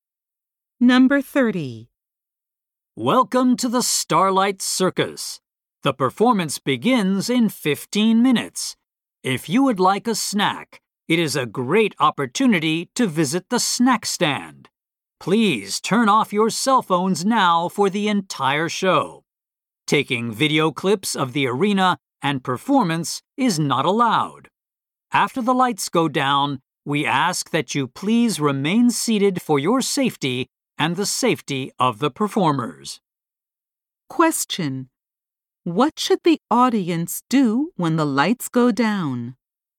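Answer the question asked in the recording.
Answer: Remain seated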